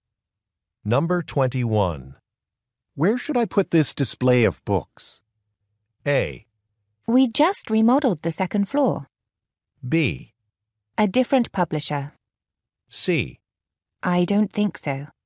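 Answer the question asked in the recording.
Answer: A: We just remodeled the second floor.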